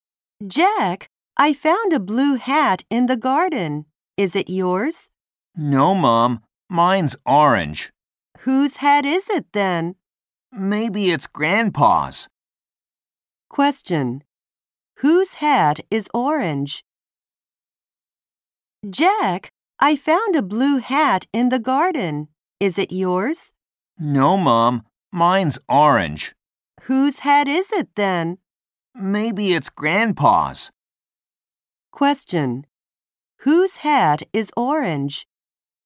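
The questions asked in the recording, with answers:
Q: Whose hat is orange?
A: Jack's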